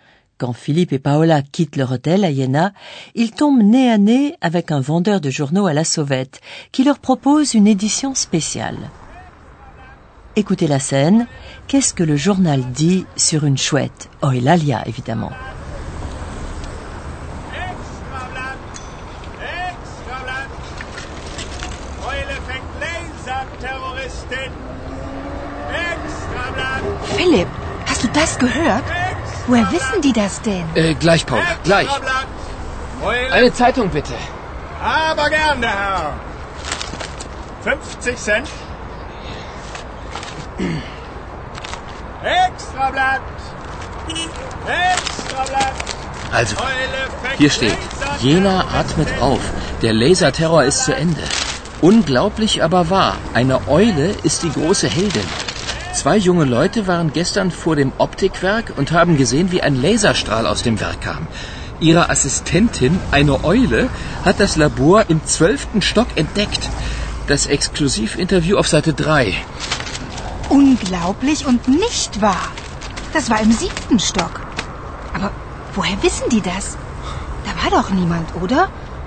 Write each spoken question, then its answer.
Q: Qu'est-ce que le journal dit sur une chouette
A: Dans l'édition spéciale qu'il a achetée, Philippe lit qu'une chouette est l'assistante de deux jeunes gens et qu'elle a découvert le laboratoire au douzième étage.